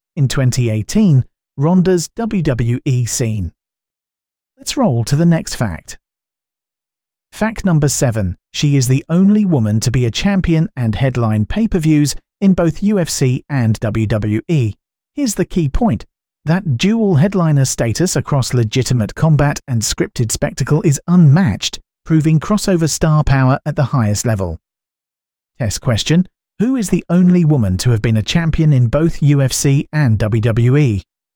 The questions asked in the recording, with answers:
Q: Who is the only woman to have been a champion in both UFC and WWE?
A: Correct answer. Ronda Rousey.